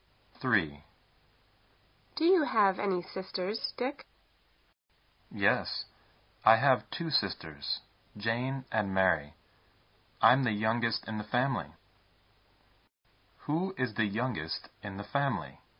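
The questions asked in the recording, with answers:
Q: Who is the youngest in the family?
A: Dick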